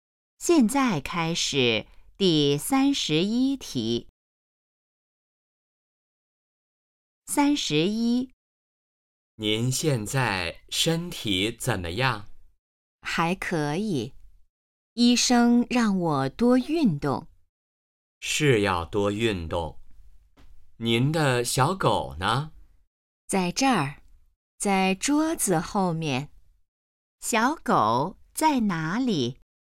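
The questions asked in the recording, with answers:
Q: 小狗在哪里?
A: 桌子后面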